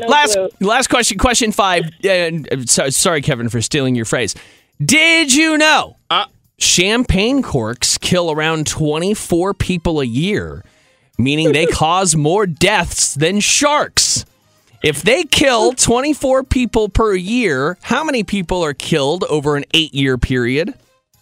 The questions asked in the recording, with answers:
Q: If they kill 24 people per year, how many people are killed over an 8-year period?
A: 192.